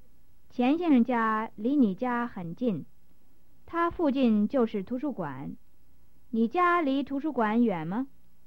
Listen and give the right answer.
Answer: 我家离图书馆不远。